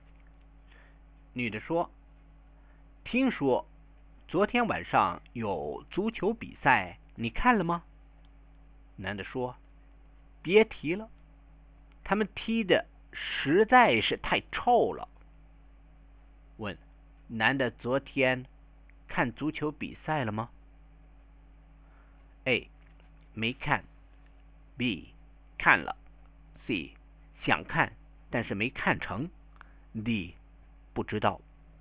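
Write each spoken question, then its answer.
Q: 男的昨天看足球比赛了吗?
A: B: 看了。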